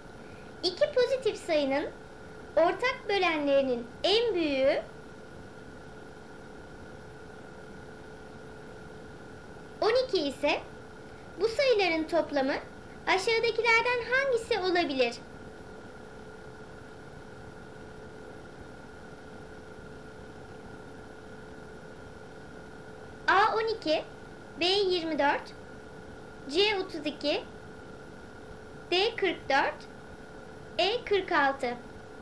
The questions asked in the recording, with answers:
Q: 12 ise bu sayıların toplamı aşağıdakilerden hangisi olabilir?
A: Doğru cevap B 24.